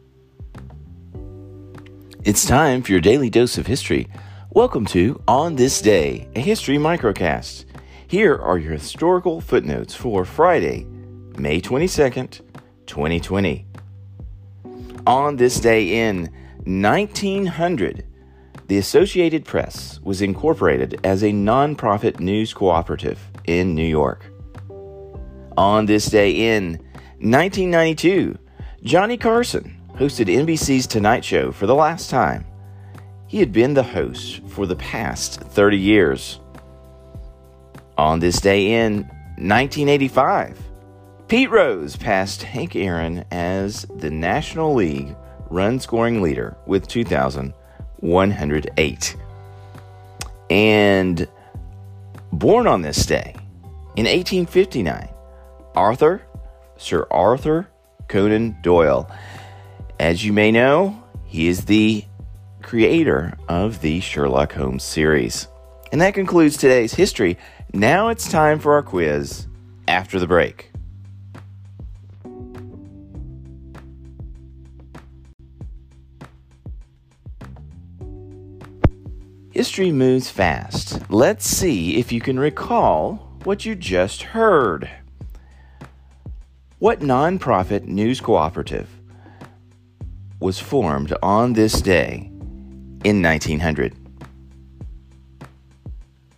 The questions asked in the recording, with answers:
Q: What nonprofit news cooperative was formed on this day in 1900?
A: Answer, the Associated Press.